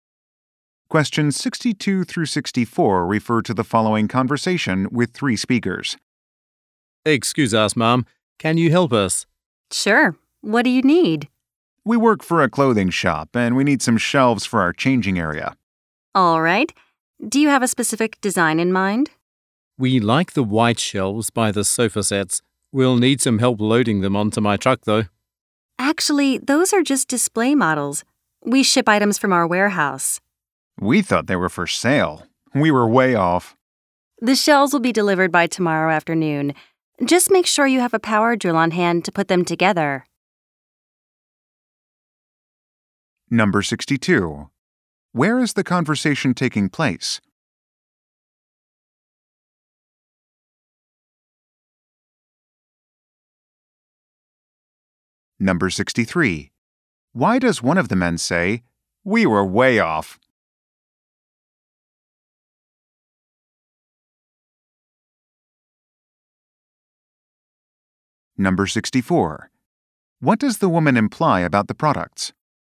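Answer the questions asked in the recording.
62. At a furniture store
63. They wrongly thought the display models were for sale
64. They need to be assembled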